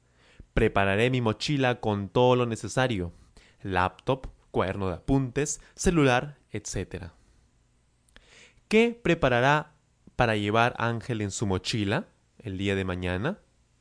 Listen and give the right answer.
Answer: Claro, él preparará en su mochila su laptop, su cuaderno de apuntes, su celular, etc.